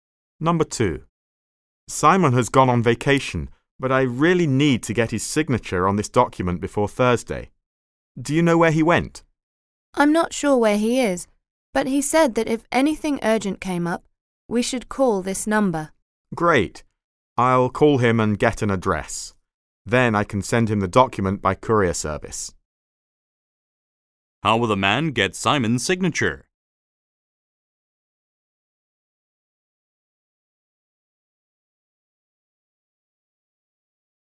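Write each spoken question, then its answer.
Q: How will the man get Simon's signature?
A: He will send the document to Simon by courier.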